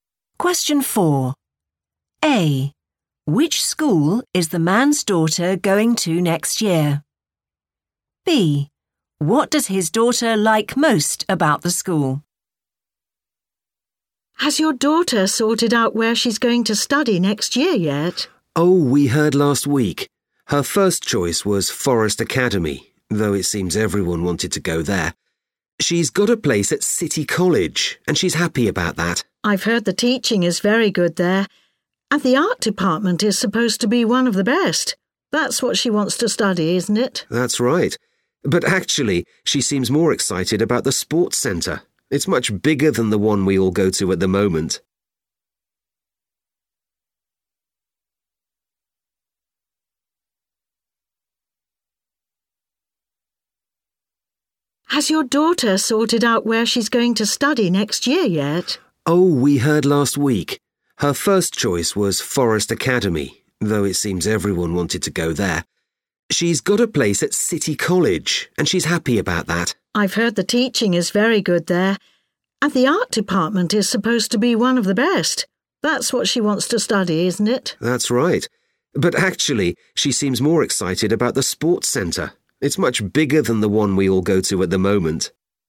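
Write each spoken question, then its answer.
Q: Which school is the man's daughter going to next year?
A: City College

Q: What does his daughter like most about the school?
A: the sports centre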